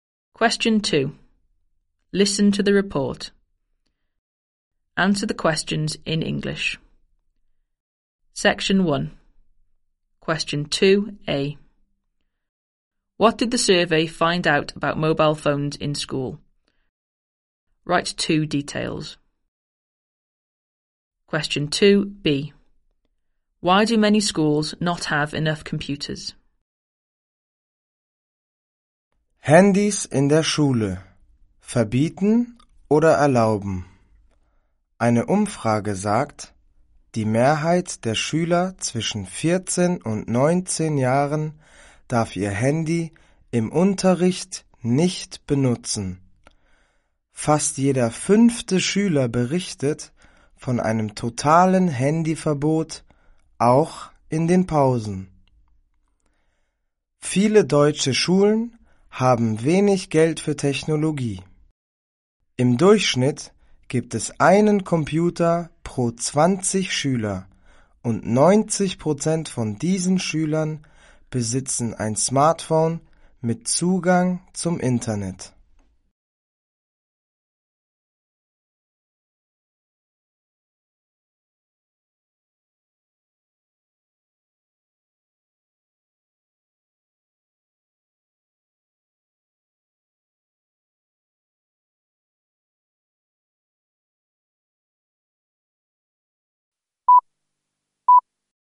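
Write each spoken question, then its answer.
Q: What did the survey find out about mobile phones in school?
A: Most students aged 14-19 can't use their phones in lessons; almost one in five has a total ban, even at break

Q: Why do many schools not have enough computers?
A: They have little money for technology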